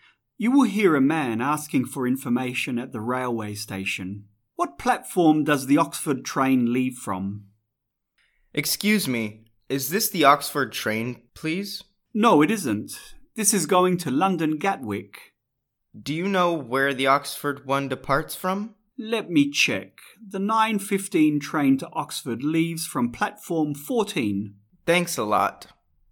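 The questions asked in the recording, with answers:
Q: What platform does the Oxford train leave from?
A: Platform 14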